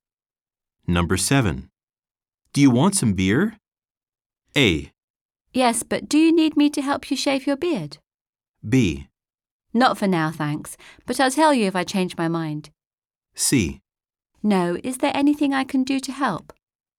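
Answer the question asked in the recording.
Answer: B: Not for now, thanks, but I'll tell you if I change my mind.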